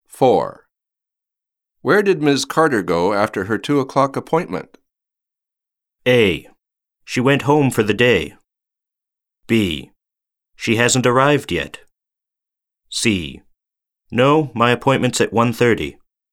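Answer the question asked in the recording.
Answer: A: She went home for the day.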